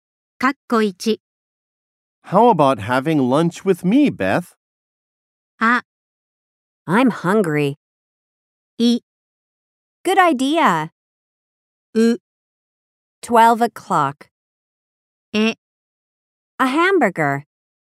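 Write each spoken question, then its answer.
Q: How about having lunch with me, Beth?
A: い: Good idea.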